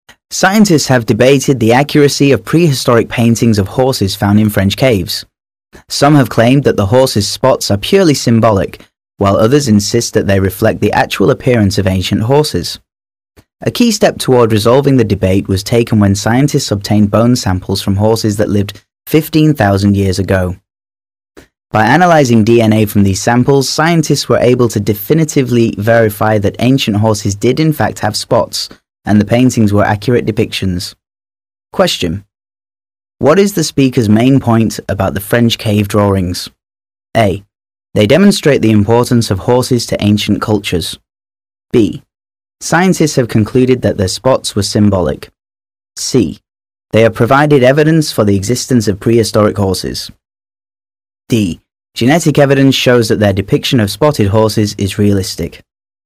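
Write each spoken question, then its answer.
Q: what is the speaker's main point about the French cave drawings?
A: D: Genetic evidence shows that their depiction of spotted horses is realistic.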